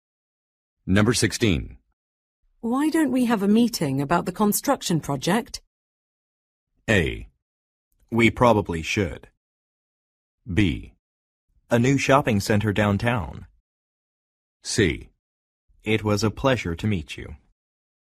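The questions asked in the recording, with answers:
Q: Why don't we have a meeting about the construction project?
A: A: We probably should.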